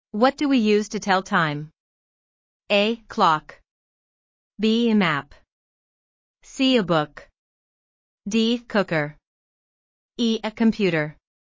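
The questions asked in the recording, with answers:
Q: What do we use to tell time?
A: A: Clock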